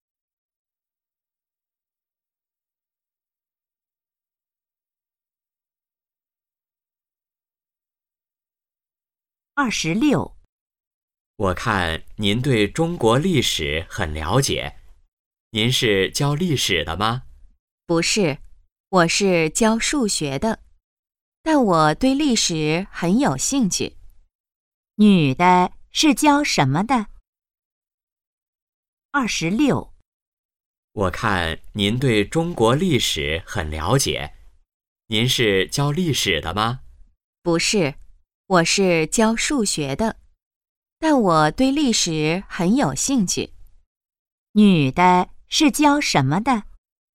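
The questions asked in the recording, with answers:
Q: 女的是教什么的?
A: 数学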